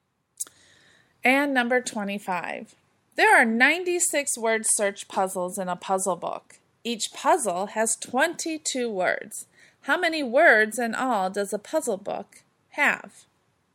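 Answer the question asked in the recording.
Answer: 2,112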